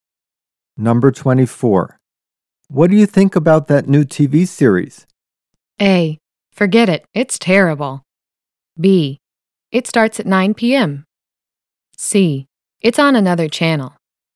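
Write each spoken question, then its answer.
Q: What do you think about that new TV series?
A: A: Forget it. It's terrible.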